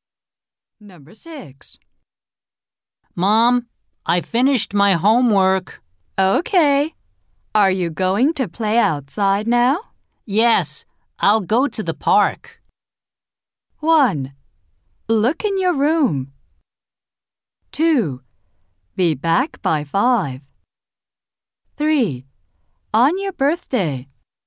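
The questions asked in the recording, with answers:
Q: Yes, I'll go to the park.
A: 2: Be back by 5.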